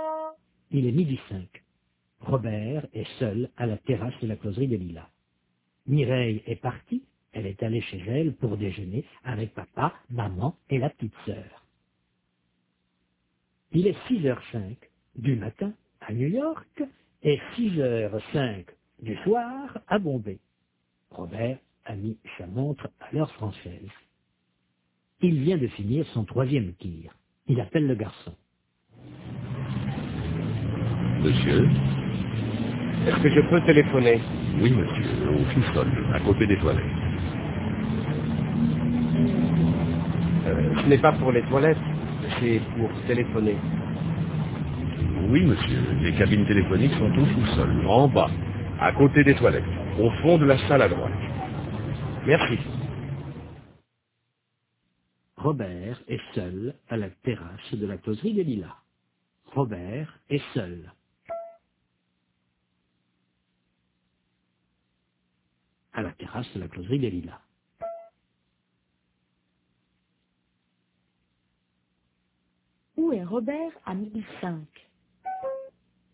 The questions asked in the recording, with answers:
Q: Où est Robert à 1005?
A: À la terrasse de la closerie des Lilas.